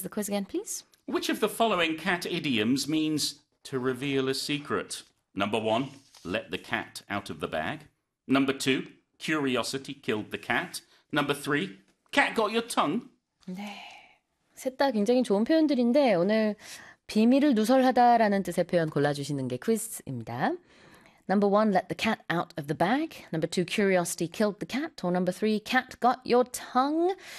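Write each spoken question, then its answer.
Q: Which of the following cat idioms means to reveal a secret?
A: 1: let the cat out of the bag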